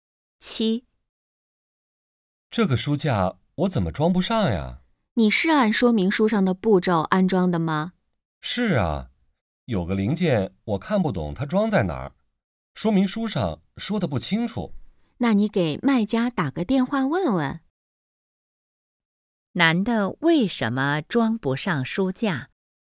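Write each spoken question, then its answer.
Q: 男的为什么装不上书架?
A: 说明书说得不清楚,看不懂一个零件装在哪儿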